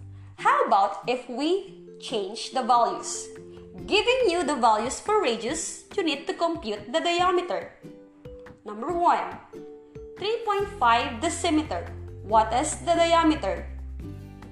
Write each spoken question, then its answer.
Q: 3.5 decimeter. What is the diameter?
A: 3.5 times 2 results to 7 decimeters.